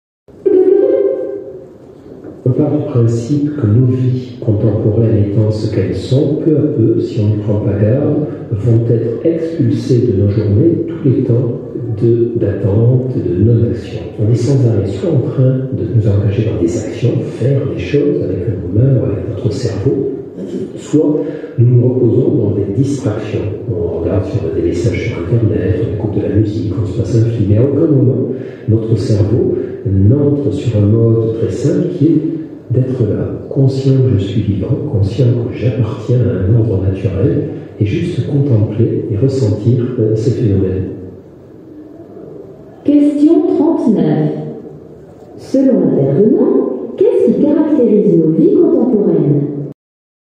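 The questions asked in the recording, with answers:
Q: Selon l'intervenant, qu'est-ce qui caractérise nos vies contemporaines ?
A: On est sans arrêt dans l'action ou les distractions, sans temps d'attente ni de contemplation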